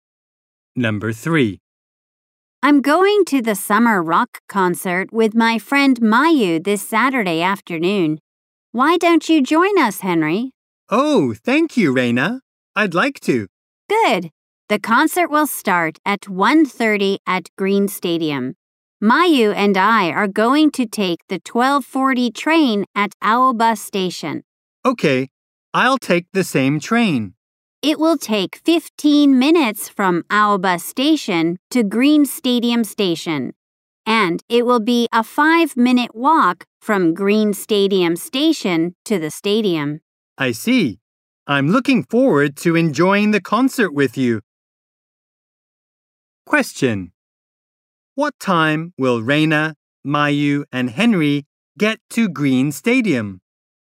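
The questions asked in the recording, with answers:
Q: What time will Reina, Mayu, and Henry get to Green Stadium?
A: At 1:00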